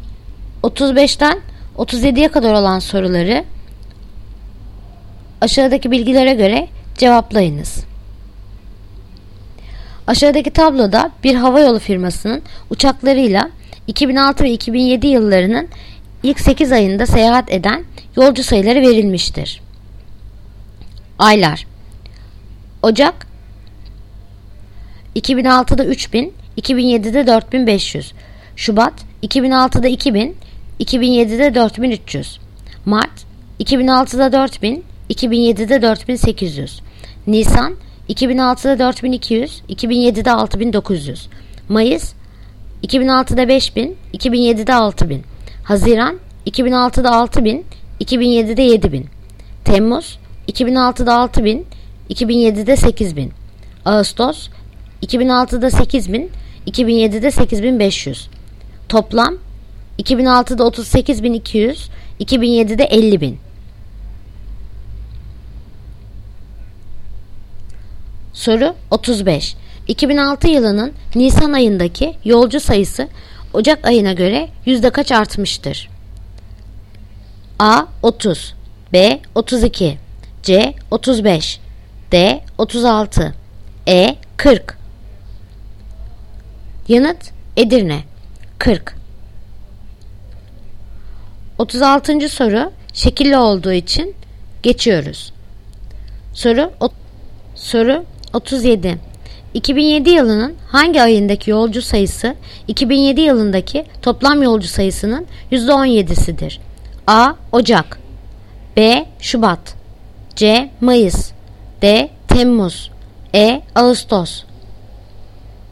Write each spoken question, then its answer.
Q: 2007 yılının hangi ayındaki yolcu sayısı 2007 yılındaki toplam yolcu sayısının %17'sidir?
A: Yanıt Edirne Ağustos